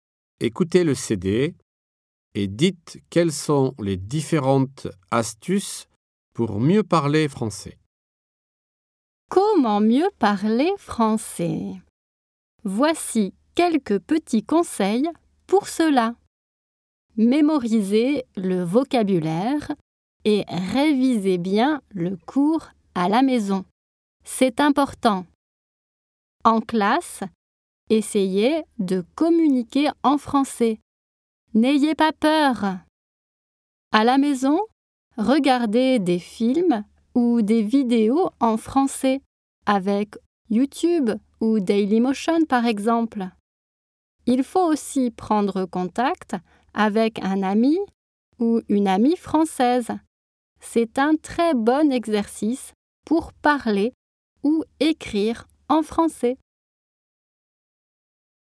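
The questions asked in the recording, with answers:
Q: Écoutez le CD et dites quelles sont les différentes astuces pour mieux parler français.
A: Mémoriser le vocabulaire et réviser le cours à la maison ; communiquer en français en classe sans avoir peur ; regarder des films ou des vidéos en français à la maison ; prendre contact avec un ami ou une amie français(e)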